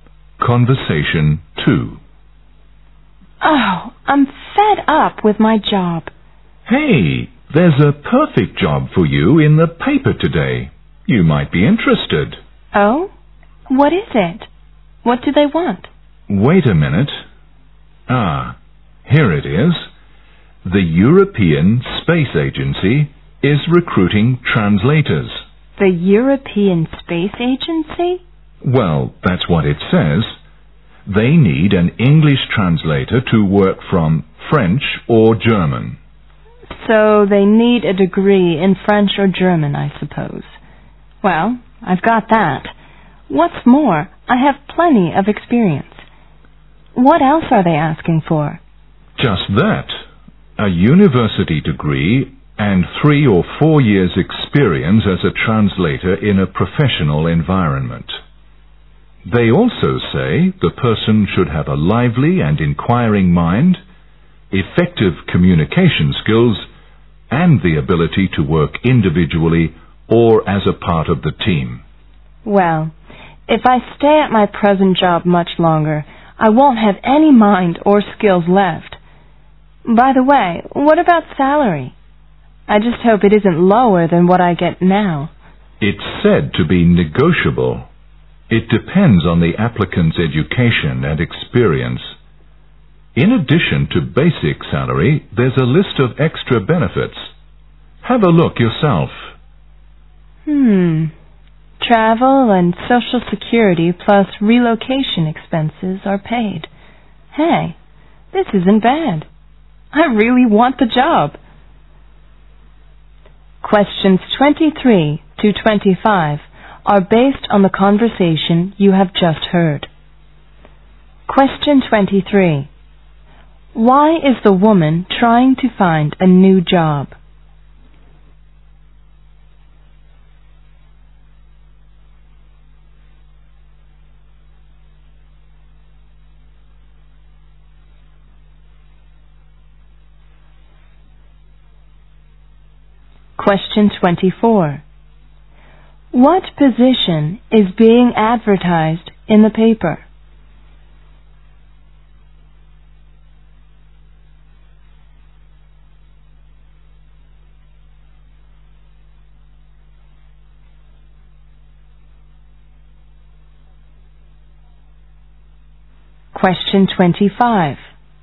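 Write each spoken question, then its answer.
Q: Why is the woman trying to find a new job?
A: She is fed up with her present job

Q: What position is being advertised in the paper?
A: A translator at the European Space Agency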